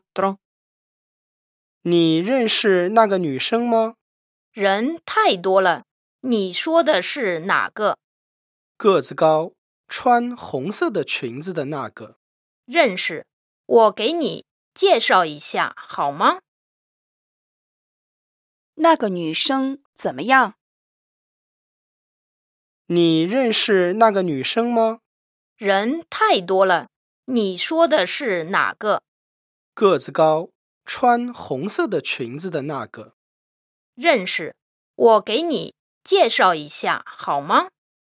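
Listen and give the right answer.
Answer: 个子高,穿红色的裙子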